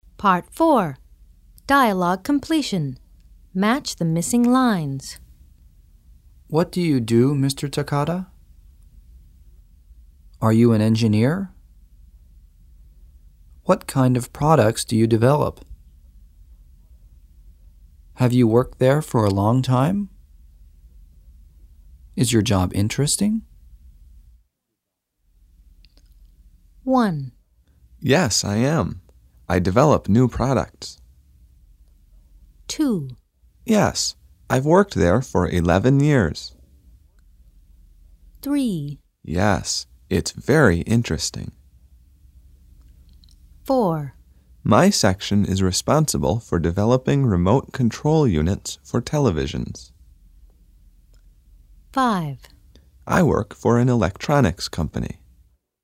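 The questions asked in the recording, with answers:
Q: What do you do, Mr. Takada?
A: 5: I work for an electronics company.

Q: Are you an engineer?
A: 1: Yes, I am. I develop new products.

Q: What kind of products do you develop?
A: 4: My section is responsible for developing remote control units for televisions.

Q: Have you worked there for a long time?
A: 2: Yes, I've worked there for 11 years.

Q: Is your job interesting?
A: 3: Yes, it's very interesting.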